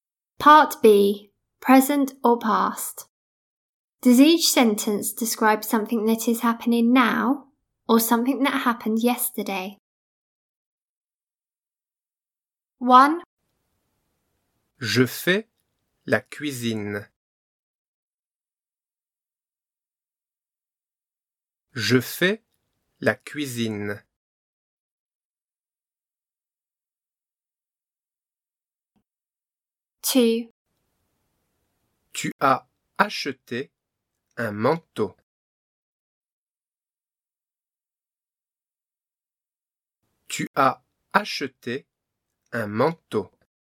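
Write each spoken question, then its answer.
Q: Does each sentence describe something that is happening now or something that happened yesterday?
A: Happening now

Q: Does each sentence describe something that is happening now or something that happened yesterday?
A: Happened yesterday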